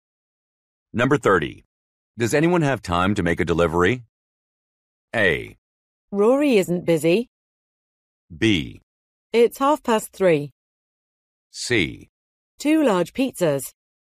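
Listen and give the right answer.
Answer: A: Rory isn't busy.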